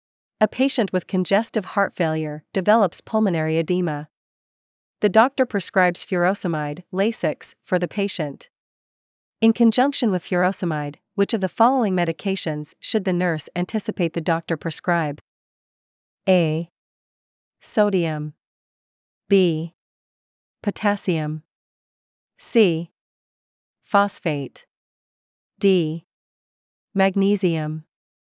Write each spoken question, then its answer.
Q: In conjunction with furosemide, which of the following medications should the nurse anticipate the doctor prescribe?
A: Answer B.